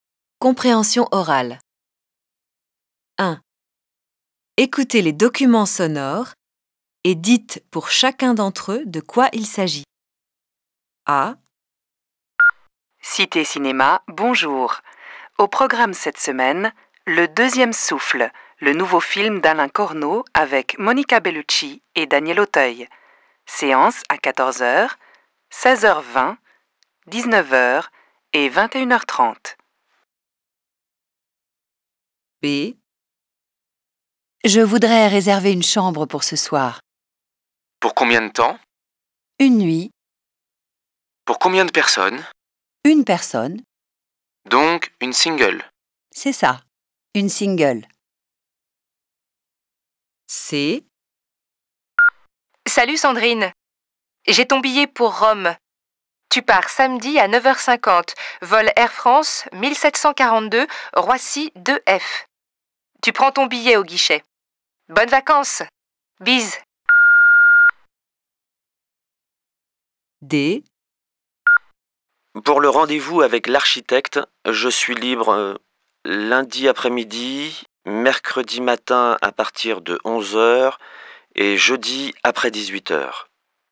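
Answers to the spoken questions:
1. Un message du cinéma qui annonce le programme et les horaires des séances
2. La réservation d'une chambre d'hôtel
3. Un message sur un billet d'avion pour Rome
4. Un message qui donne les disponibilités pour un rendez-vous avec l'architecte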